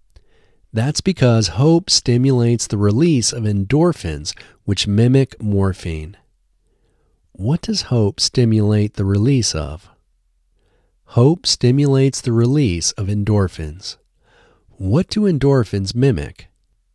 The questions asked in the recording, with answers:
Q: What does hope stimulate the release of?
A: Hope stimulates the release of endorphins.

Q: What do endorphins mimic?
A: Endorphins mimic morphine.